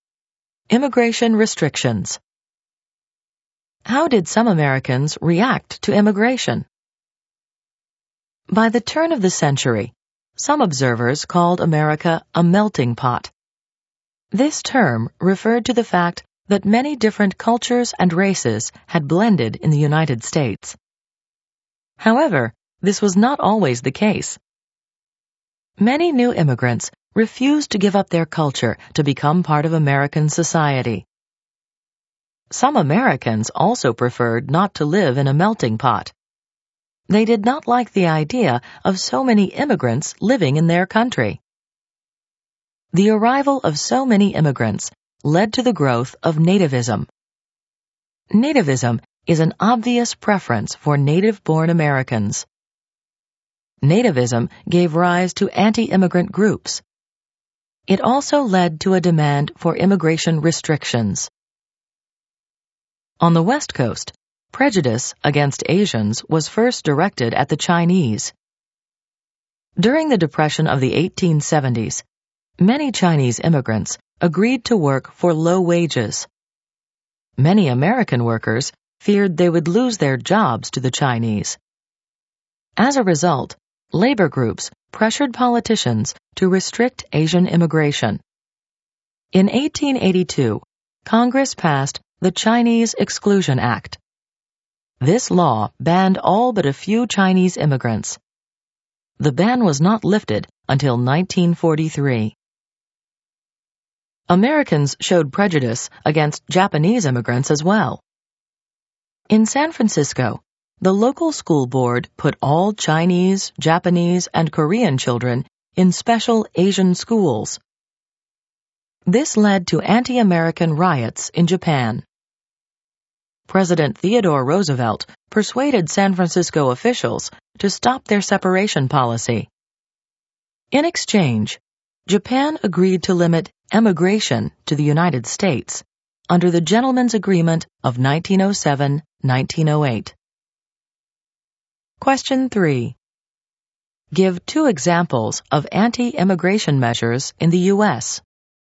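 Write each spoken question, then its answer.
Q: Give two examples of anti-immigration measures in the U.S.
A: The Chinese Exclusion Act of 1882 and the Gentlemen's Agreement of 1907-1908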